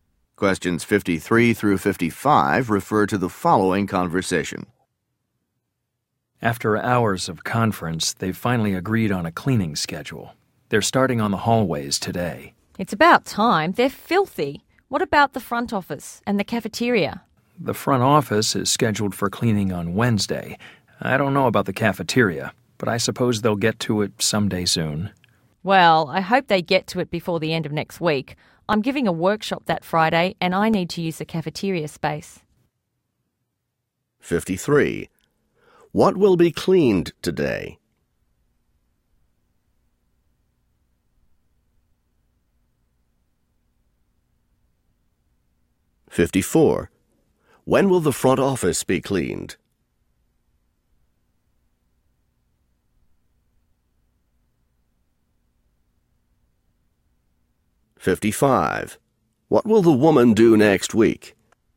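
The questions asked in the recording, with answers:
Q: What will be cleaned today?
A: The hallways

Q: When will the front office be cleaned?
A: On Wednesday

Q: What will the woman do next week?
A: Give a workshop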